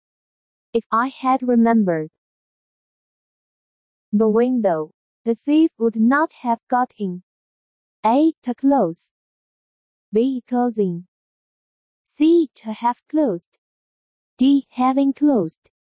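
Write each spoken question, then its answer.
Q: If I had remembered the window, the thief would not have got in.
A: A: To close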